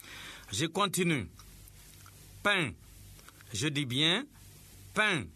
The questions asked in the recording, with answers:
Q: Pain. Je dis bien pain.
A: Monsieur, il y a une syllabe.